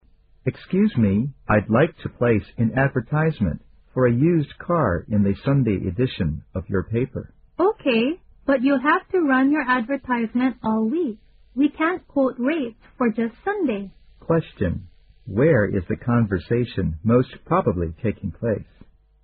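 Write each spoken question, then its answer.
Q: where is the conversation most probably taking place?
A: At a newspaper office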